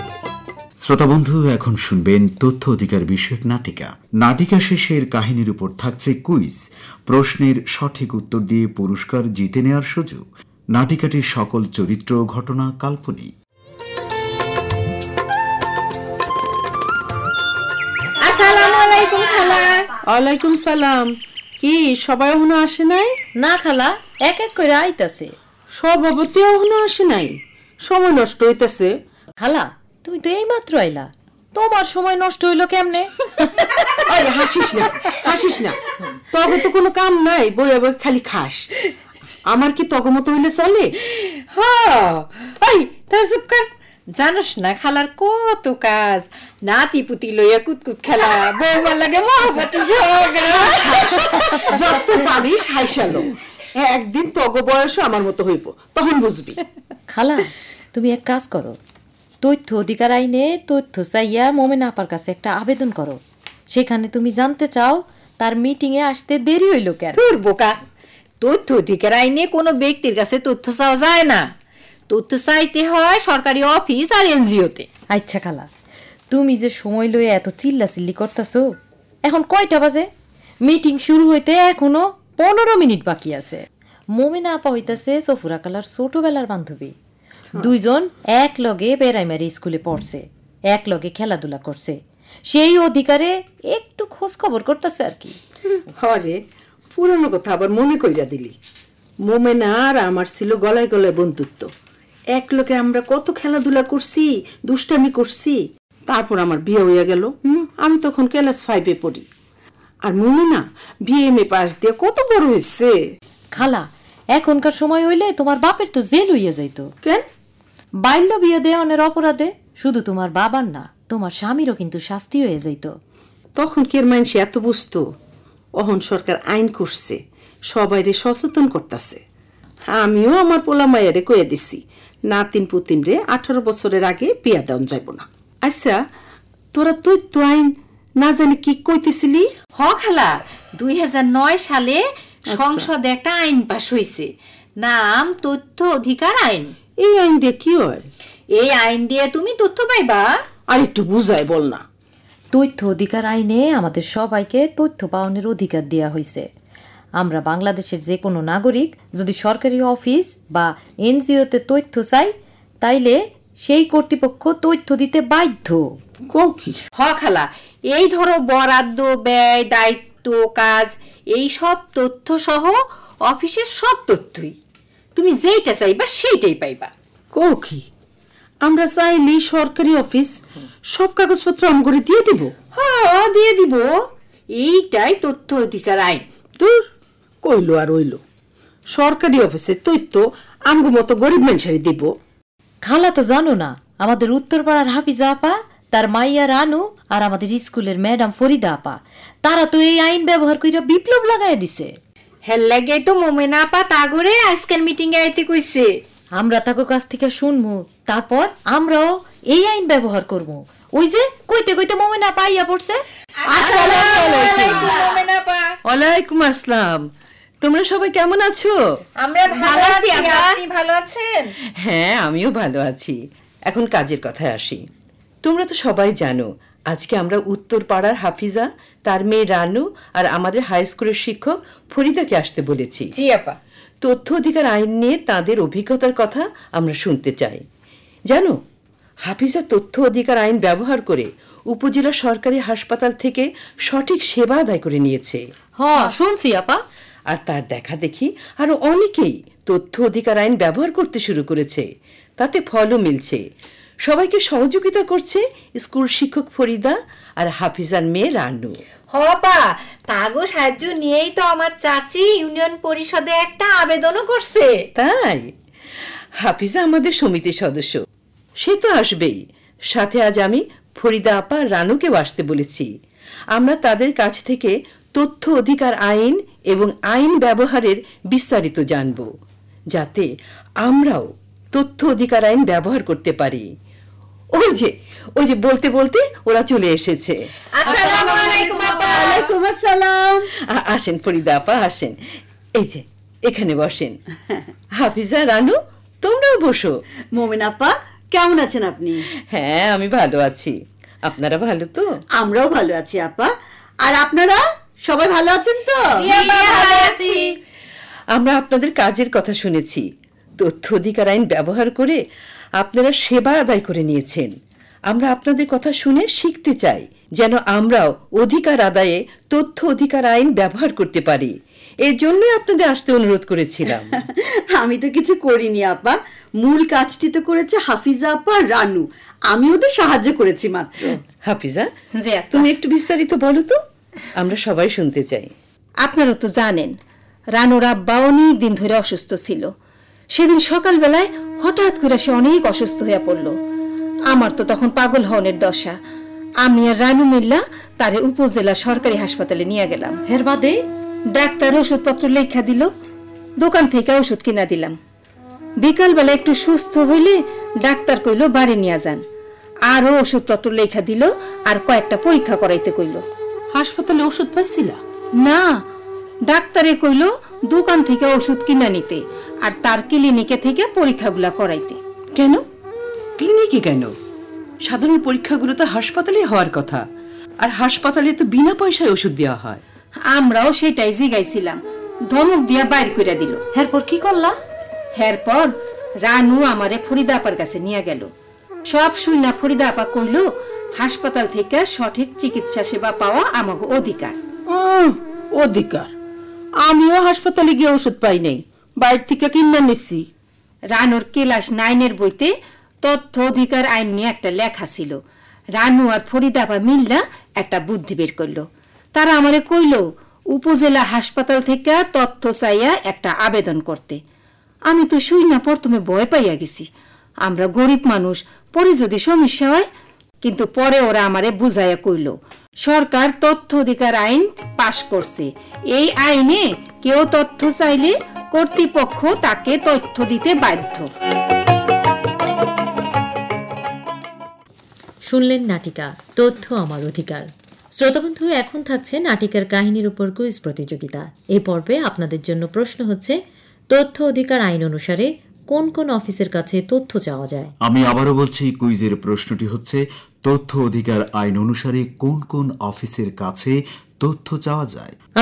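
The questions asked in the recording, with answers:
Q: তথ্য অধিকার আইন অনুসারে কোন কোন অফিসের কাছে তথ্য চাওয়া যায়?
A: সরকারি office ও NGO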